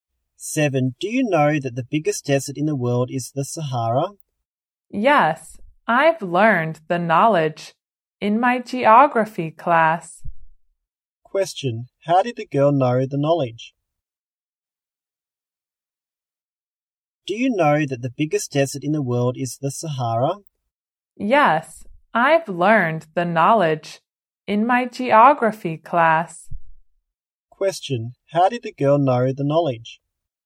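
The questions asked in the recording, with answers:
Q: How did the girl know the knowledge?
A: She learned it in her geography class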